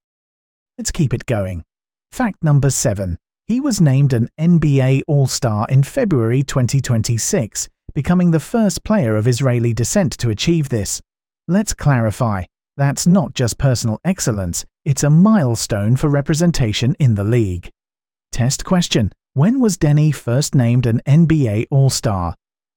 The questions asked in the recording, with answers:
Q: When was Denny first named an NBA All-Star?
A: Correct answer. February 2026.